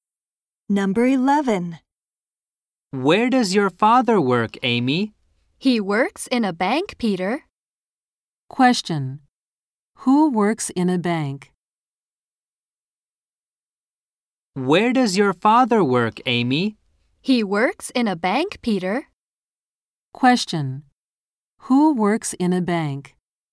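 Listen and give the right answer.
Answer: Amy's father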